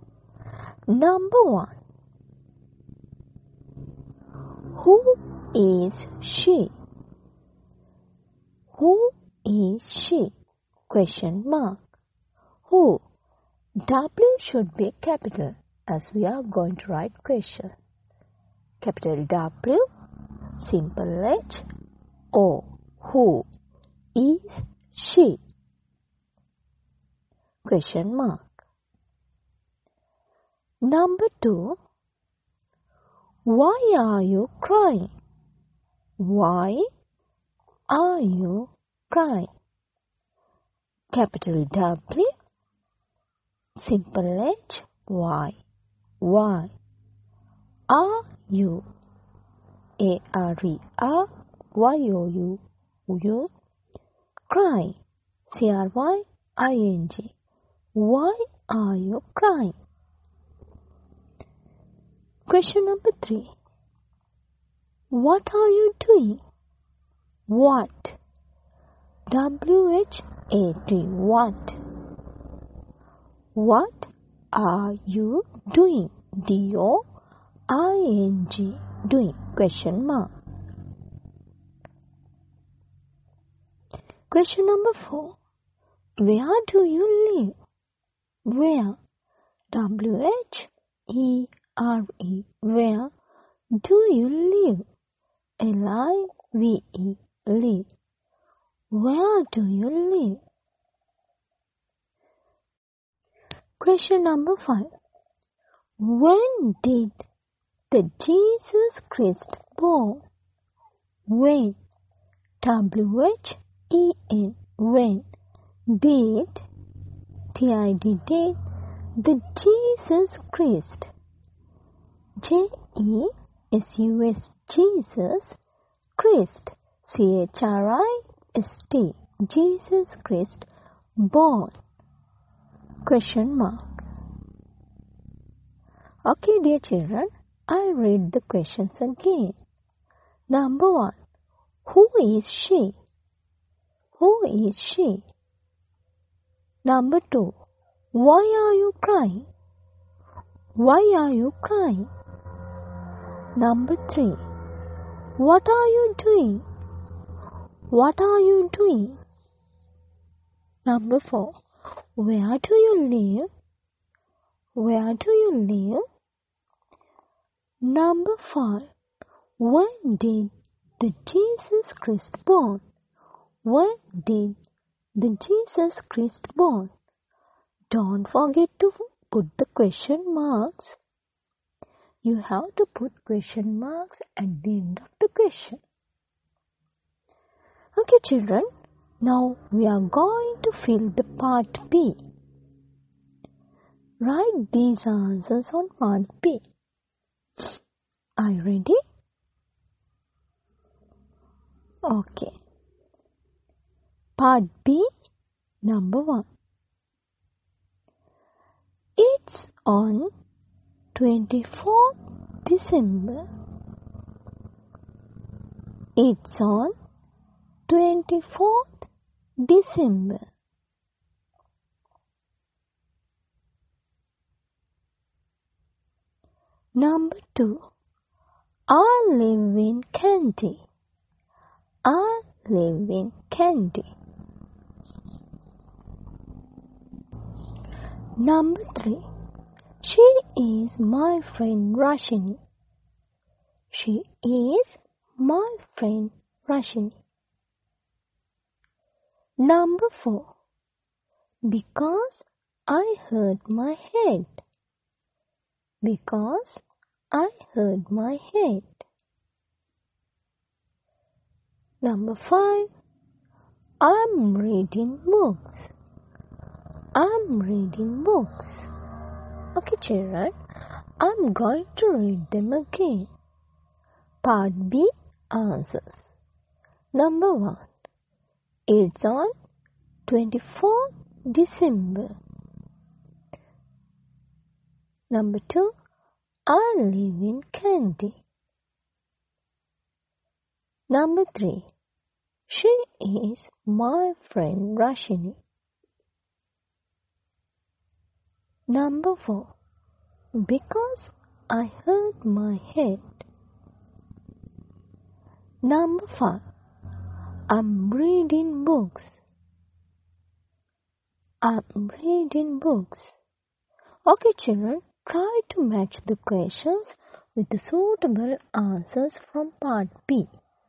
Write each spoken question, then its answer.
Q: Who is she?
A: So, answer should be number 3.

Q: Why are you crying?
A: So the answer is number 4. Because I hurt my head.

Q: What are you doing?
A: Answer is number 5.

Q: Where do you live?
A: Yes, answer is number 2.

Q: When did the Jesus Christ born?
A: Answer is number 1. 24th December.